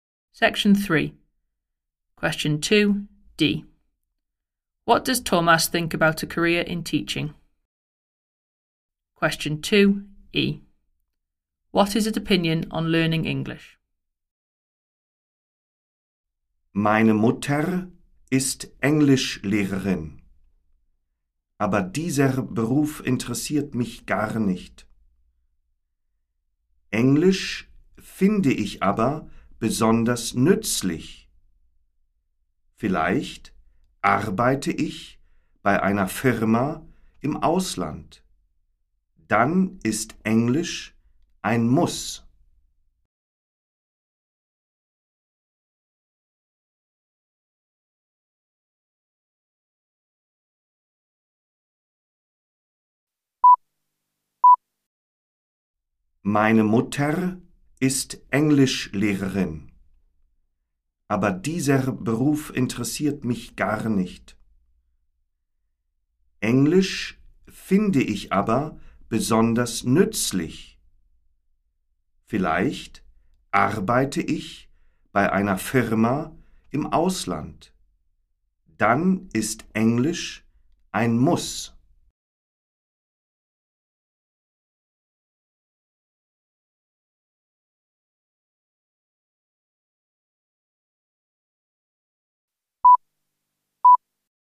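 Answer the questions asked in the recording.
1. It doesn't interest him at all
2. Especially useful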